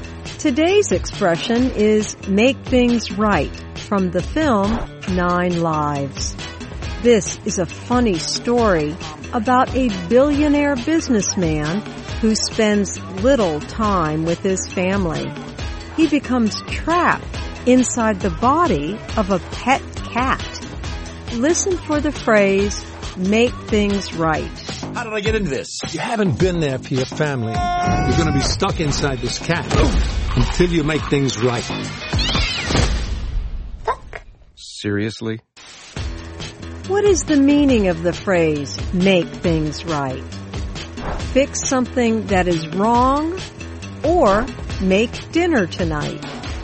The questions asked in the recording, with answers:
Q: What is the meaning of the phrase, make things right?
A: Make things right means to fix something that is wrong.